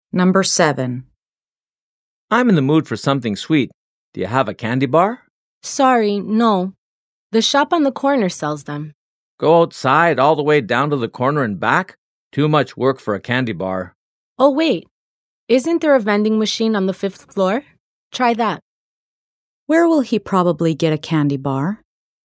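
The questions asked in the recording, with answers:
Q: Where will he probably get a candy bar?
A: From the vending machine on the 5th floor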